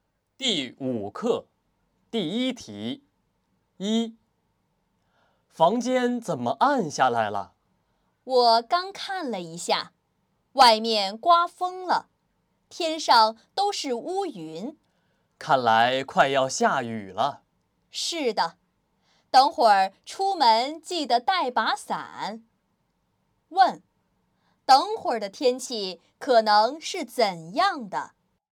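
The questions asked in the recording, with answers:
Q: 等会儿的天气可能是怎样的?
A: 会下雨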